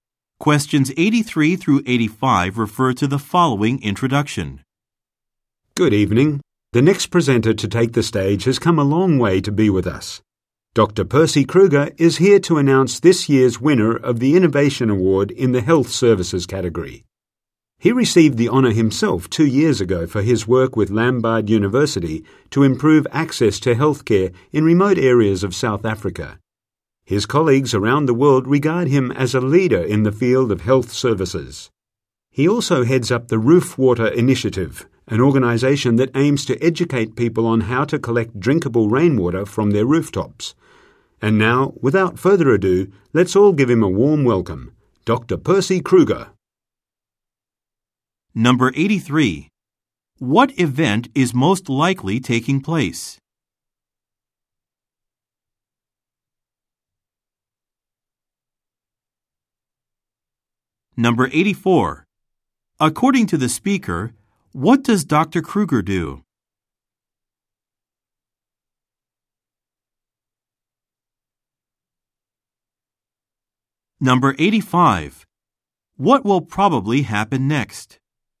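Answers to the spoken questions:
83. An awards ceremony
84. He heads an organization teaching people to collect drinkable rainwater
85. Dr. Kruger will announce the award winner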